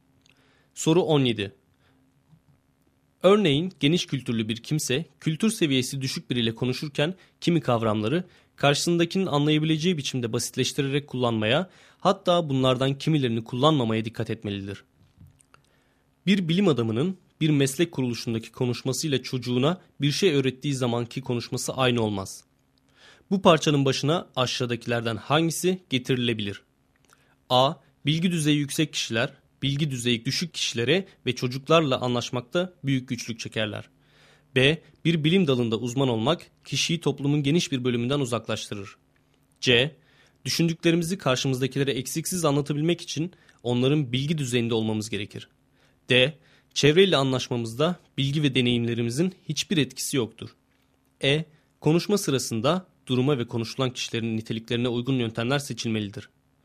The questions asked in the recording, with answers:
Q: Bu parçanın başına aşağıdakilerden hangisi getirilebilir?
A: Doğru cevap E şıkkı.